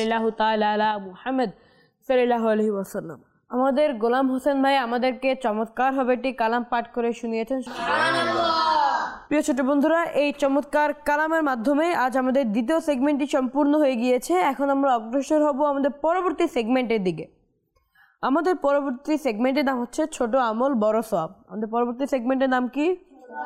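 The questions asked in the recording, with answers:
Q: আমাদের পরবর্তী সেগমেন্টের নাম কি?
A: ছোট আমল বড় সওয়াব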